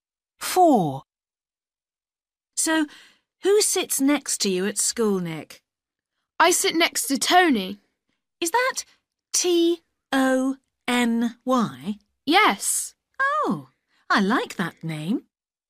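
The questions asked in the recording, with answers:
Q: So, who sits next to you at school, Nick?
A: Tony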